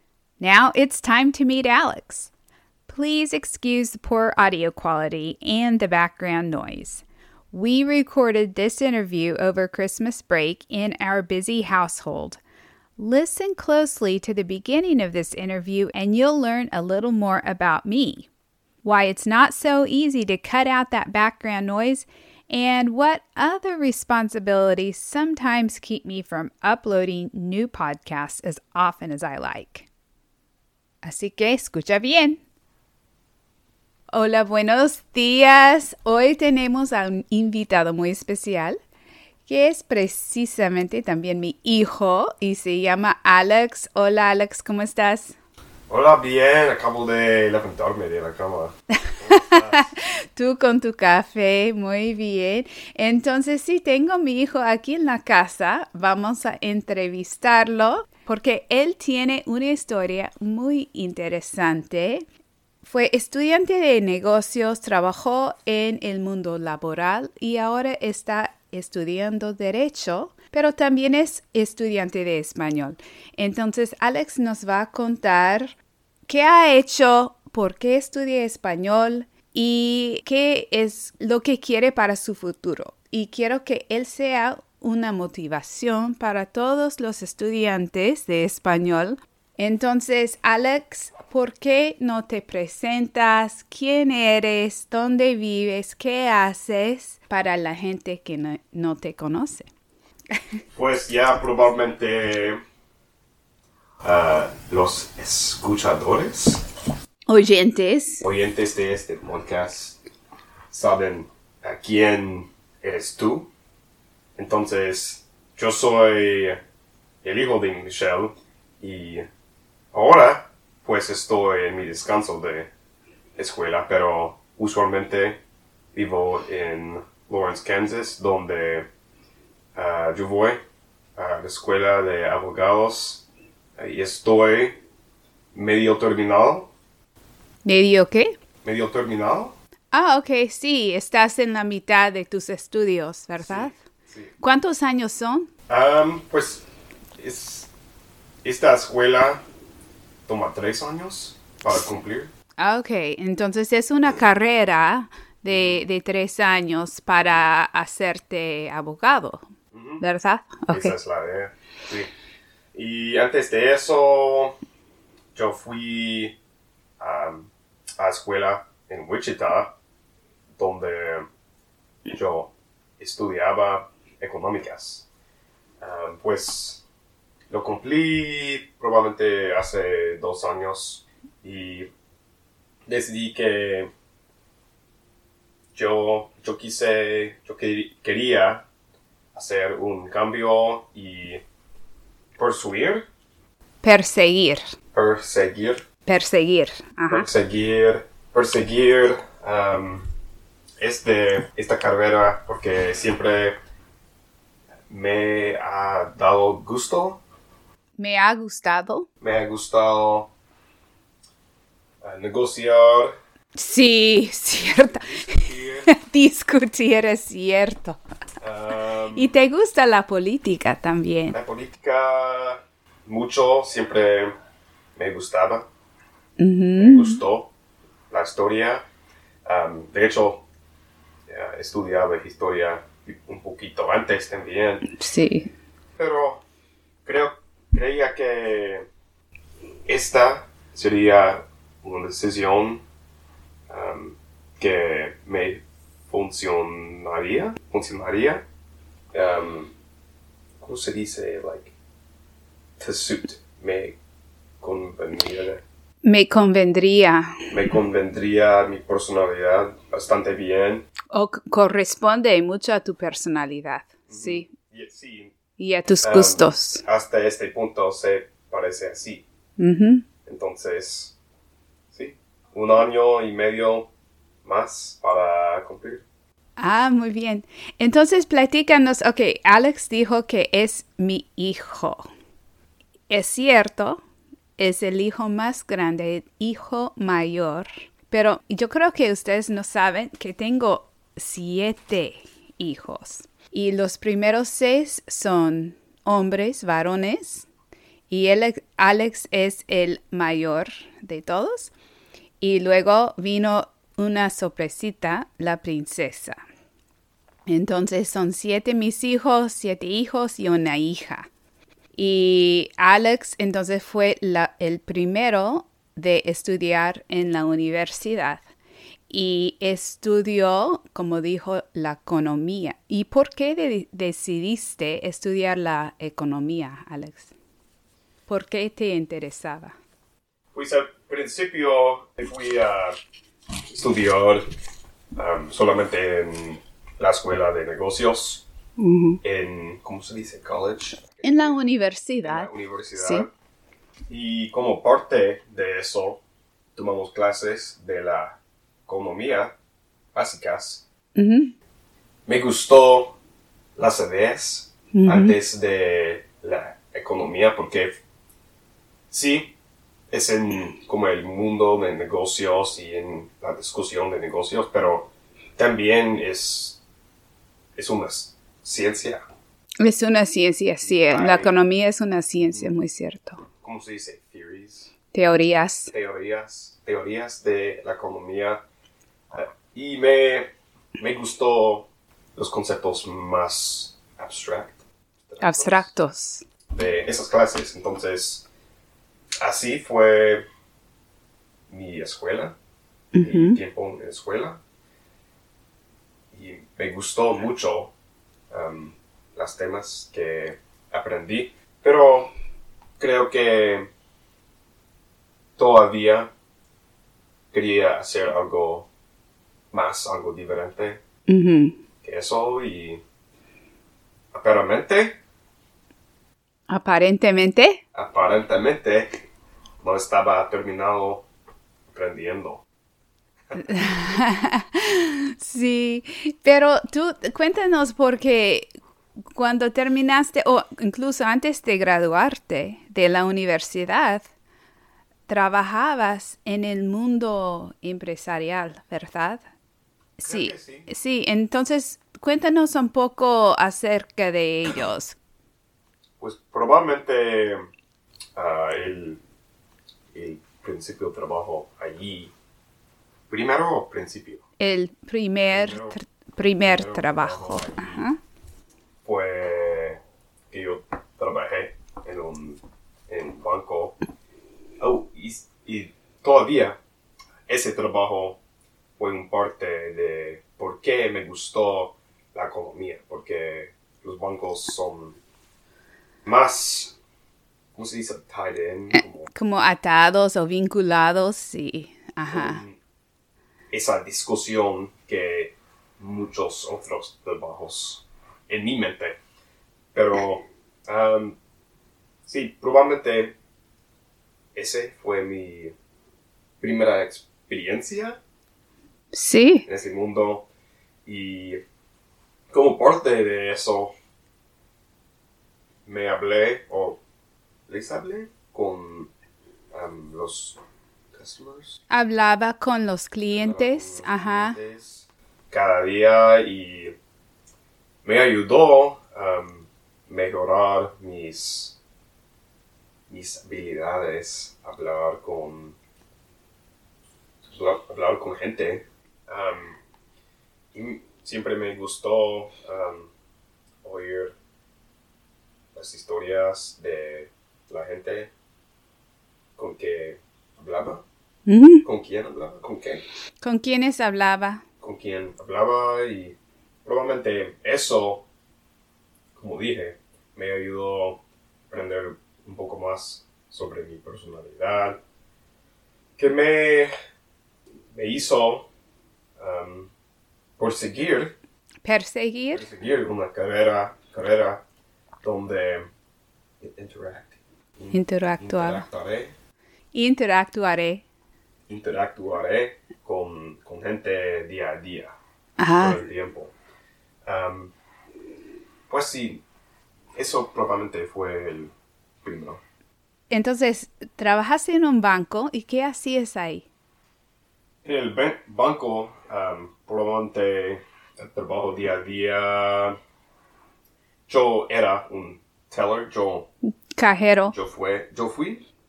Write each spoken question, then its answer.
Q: ¿Cuál fue el primer trabajo de Alex relacionado con su carrera y qué puesto ocupó?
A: Alex trabajó en un banco como cajero.